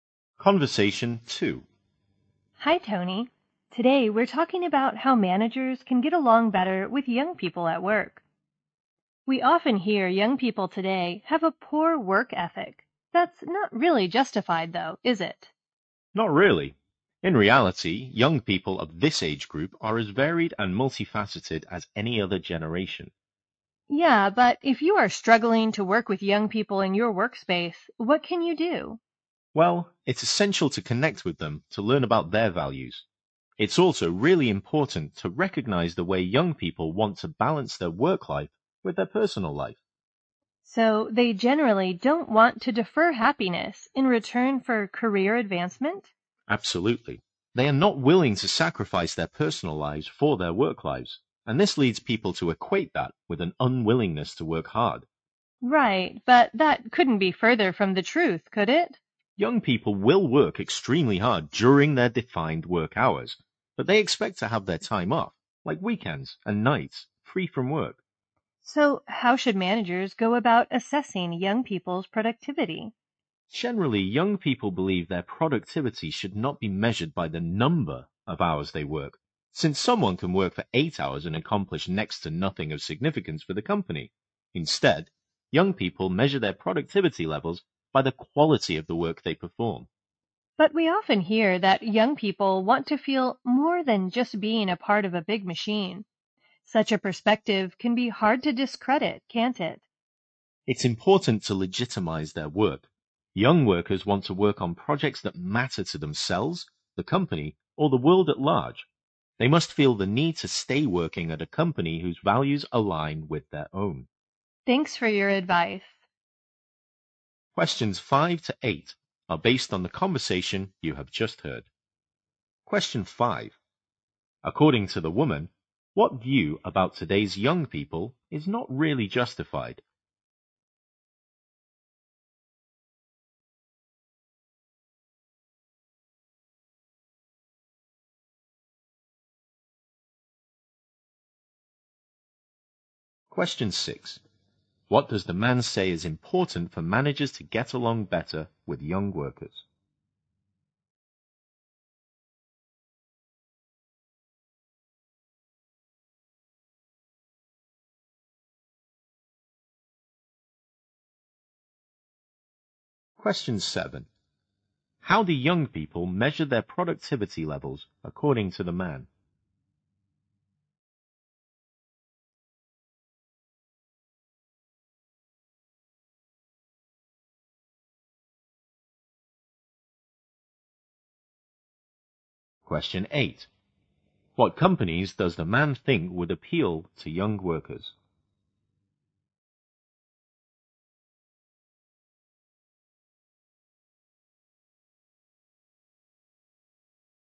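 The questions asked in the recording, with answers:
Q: According to the woman, what view about today's young people is not really justified?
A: That they have a poor work ethic

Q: What does the man say is important for managers to get along better with young workers?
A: Connecting with them to learn their values and recognizing their work-life balance

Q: How do young people measure their productivity levels according to the man?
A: By the quality of the work they perform

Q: What companies does the man think would appeal to young workers?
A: Companies whose values align with their own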